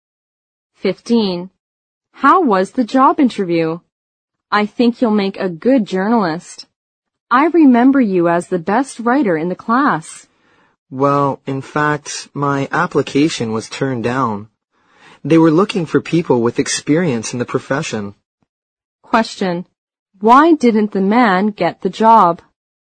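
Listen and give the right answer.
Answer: He had no experience in the profession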